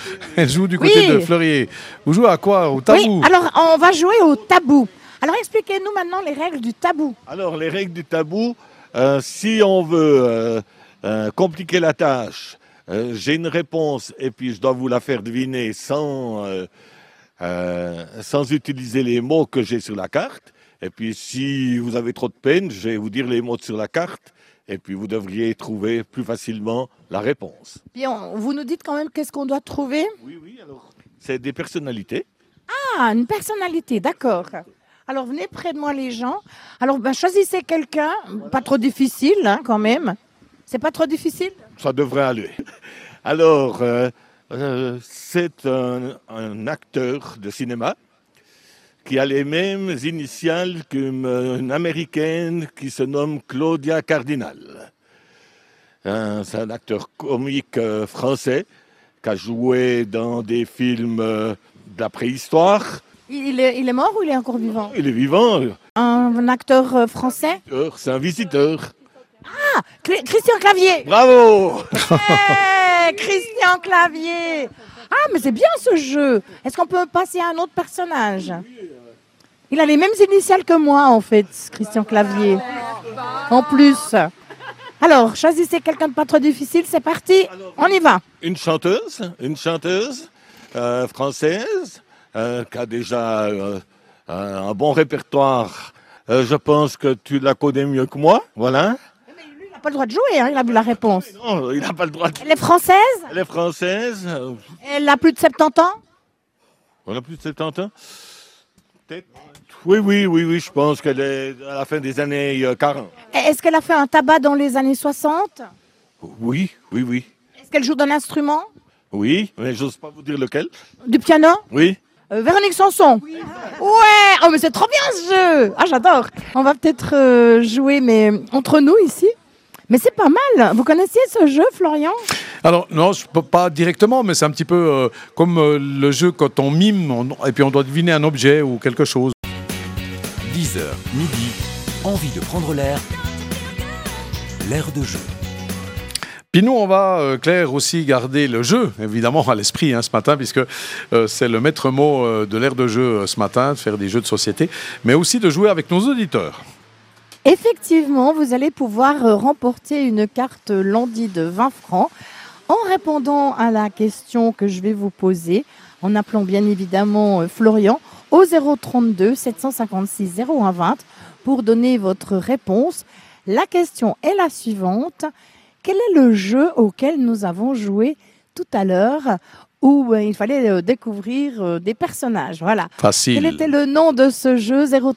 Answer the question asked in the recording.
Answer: Le tabou.